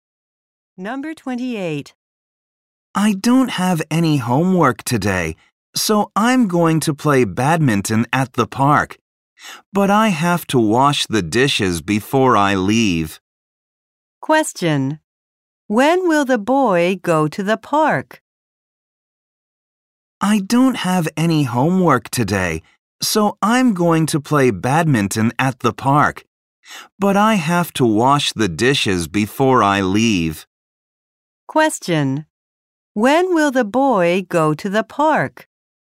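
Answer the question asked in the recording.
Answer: After he washes the dishes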